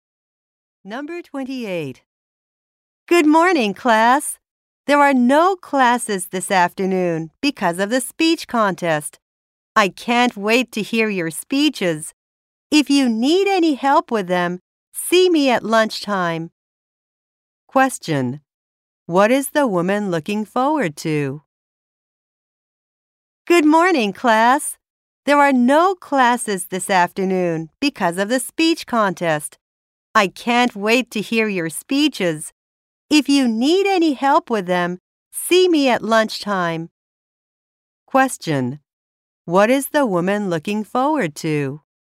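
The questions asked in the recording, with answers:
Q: What is the woman looking forward to?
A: Hearing the students' speeches.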